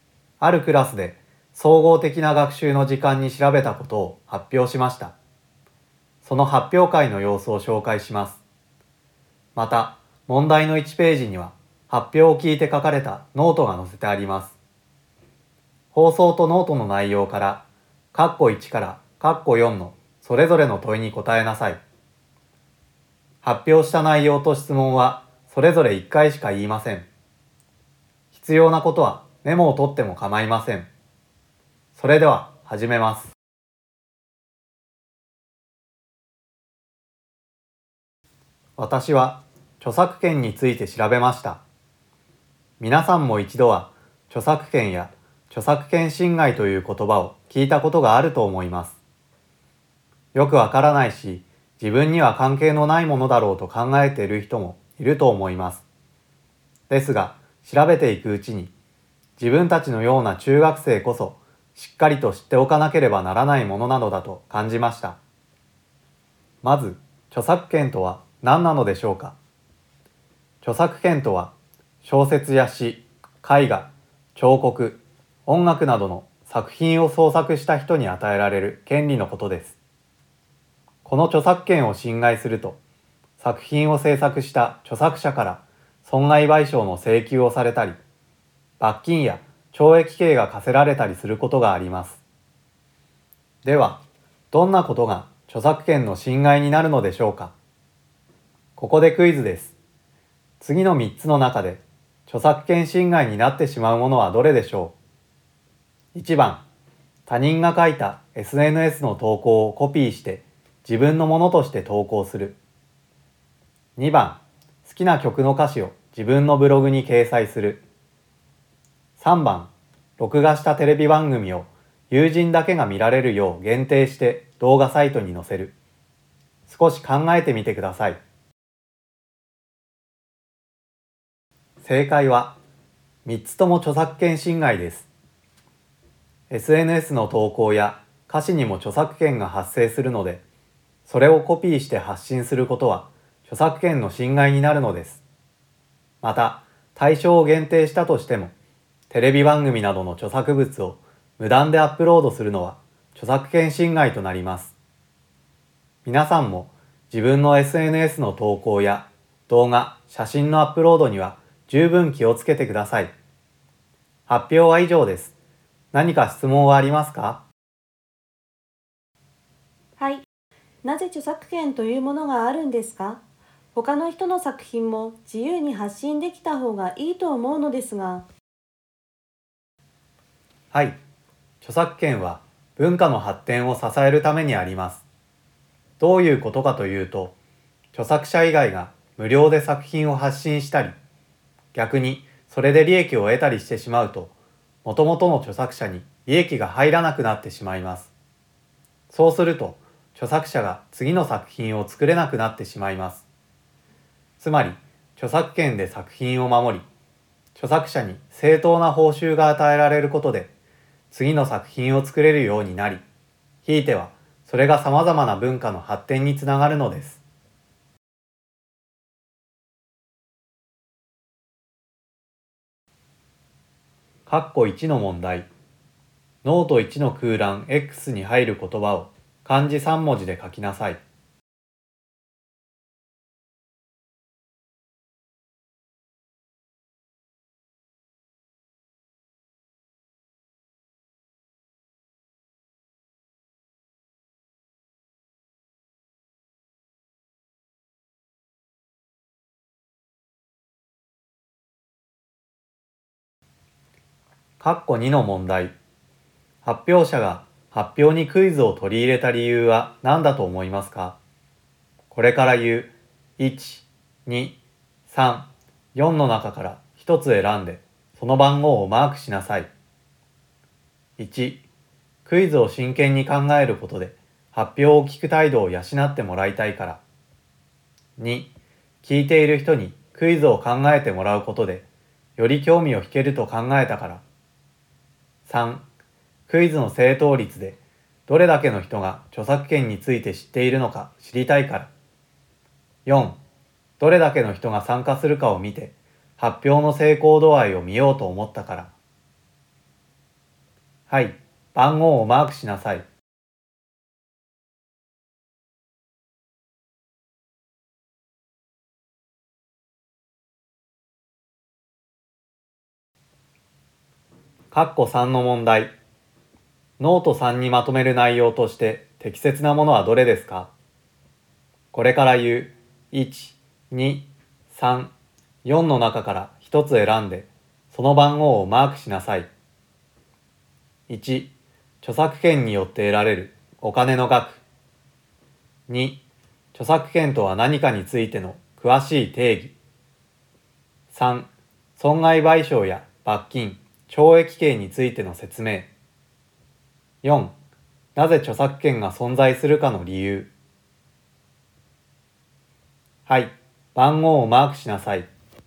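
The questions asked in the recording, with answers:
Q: 発表者が発表にクイズを取り入れた理由は何だと思いますか?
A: 2: 聞いている人にクイズを考えてもらうことでより興味を引けると考えたから。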